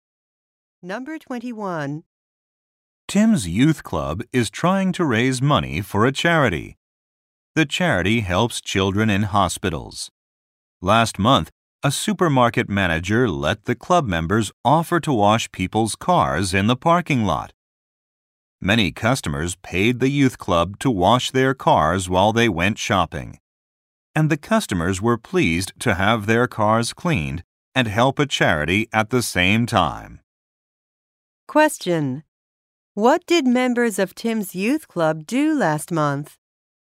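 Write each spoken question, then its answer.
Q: What did members of Tim's youth club do last month?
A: They washed people's cars in a supermarket parking lot for charity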